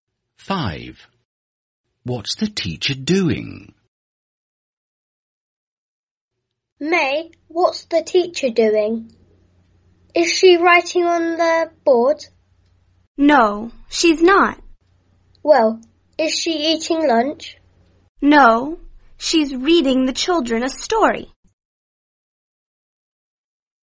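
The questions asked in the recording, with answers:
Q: What's the teacher doing?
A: Reading the children a story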